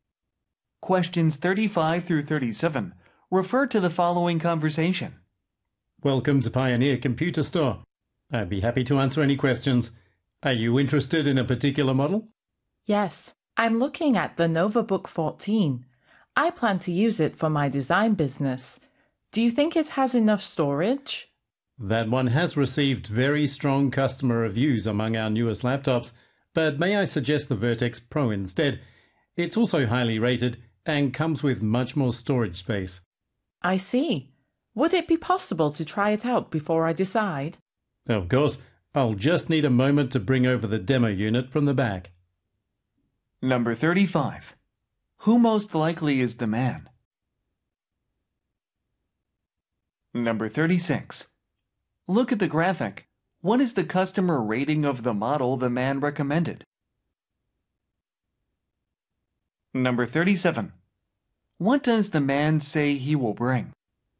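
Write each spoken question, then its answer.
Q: Who most likely is the man?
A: A computer store salesperson

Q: What does the man say he will bring?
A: A demo unit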